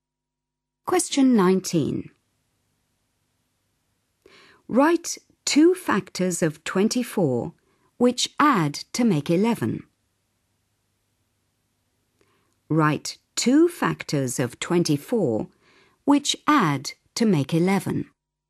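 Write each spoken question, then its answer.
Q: Write 2 factors of 24 which add to make 11.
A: 3 and 8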